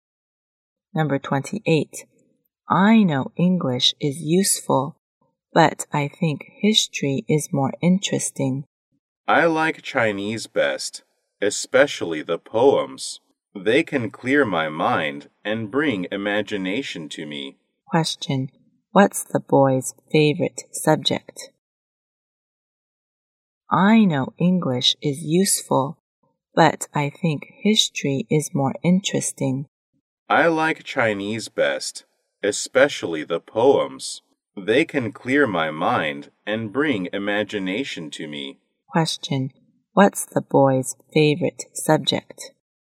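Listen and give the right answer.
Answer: Chinese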